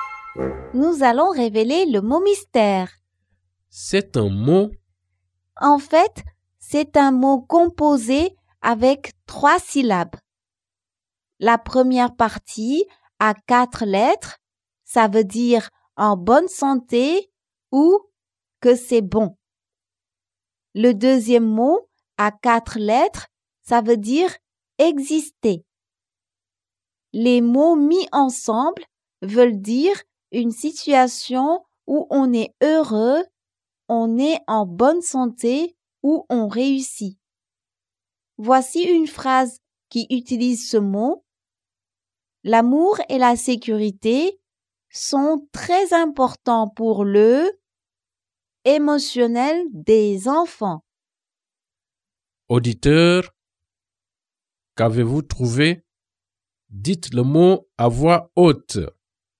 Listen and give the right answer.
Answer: Le mot mystère est bien-être.